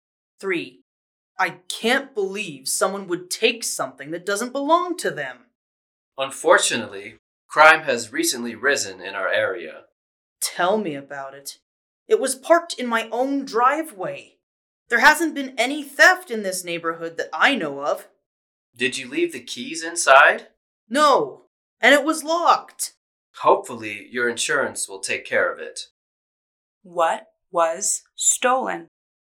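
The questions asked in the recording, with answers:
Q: What was stolen?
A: A car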